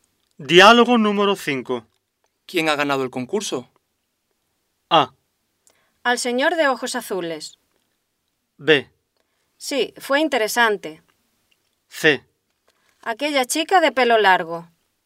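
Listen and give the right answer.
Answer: C: Aquella chica de pelo largo.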